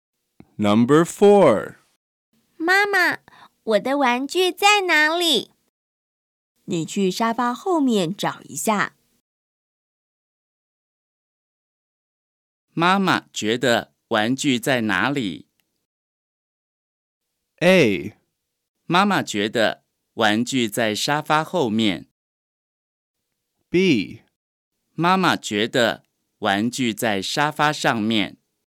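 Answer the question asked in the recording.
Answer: A: 妈妈觉得玩具在沙发后面。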